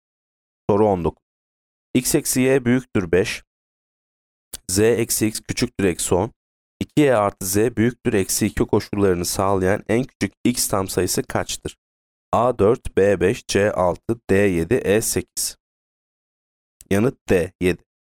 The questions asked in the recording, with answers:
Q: 2y artı z büyüktür eksi 2 koşullarını sağlayan en küçük x tam sayısı kaçtır?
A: Yanıt D 7.